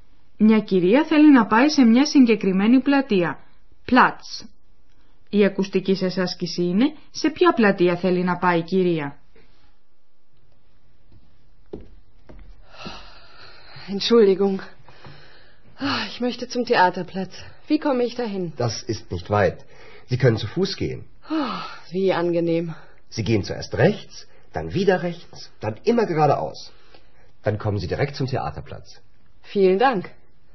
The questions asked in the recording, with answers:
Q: Η ακουστική σας άσκηση είναι σε ποια πλατεία θέλει να πάει η κυρία.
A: Η πλατεία που ψάχνει να βρει η κυρία είναι η πλατεία θεάτρου.